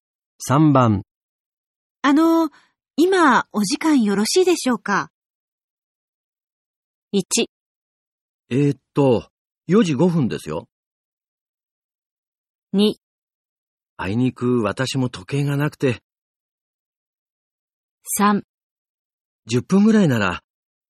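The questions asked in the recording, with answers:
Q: 今お時間よろしいでしょうか?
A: 3: 10分ぐらいなら。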